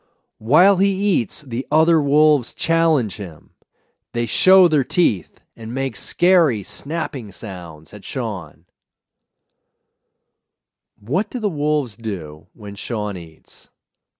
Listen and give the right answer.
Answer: When Sean eats, the wolves challenge him.